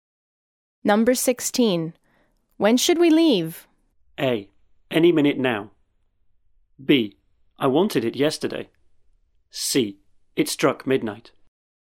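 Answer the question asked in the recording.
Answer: A: Any minute now.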